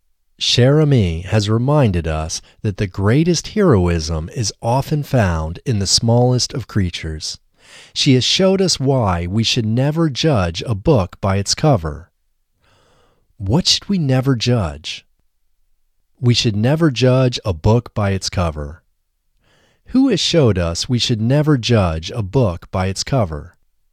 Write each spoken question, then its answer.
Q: What should we never judge?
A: We should never judge a book by its cover.

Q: Who has showed us we should never judge a book by its cover?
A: Cher Ami has showed us we should never judge a book by its cover.